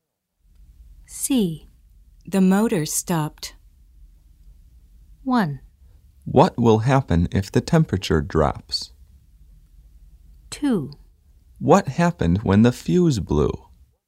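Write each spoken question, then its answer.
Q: The motor stopped.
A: 2: What happened when the fuse blew?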